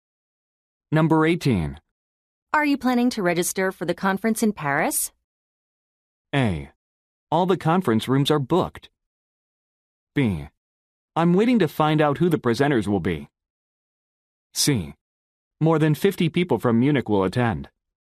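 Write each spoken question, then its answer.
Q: Are you planning to register for the conference in Paris?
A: B: I'm waiting to find out who the presenters will be.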